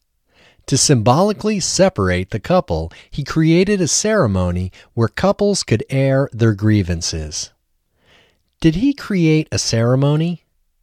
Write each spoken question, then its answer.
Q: Did he create a ceremony?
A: Yes, he created a ceremony.